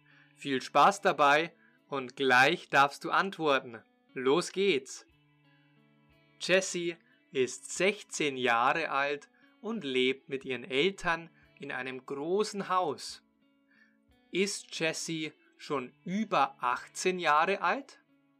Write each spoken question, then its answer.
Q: Ist Jessie schon über 18 Jahre alt?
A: Nein, sie ist noch nicht über 18 Jahre alt.